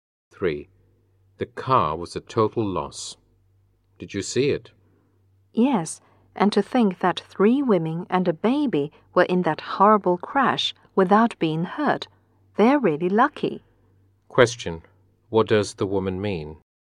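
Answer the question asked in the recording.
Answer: The people in the crash were lucky not to be hurt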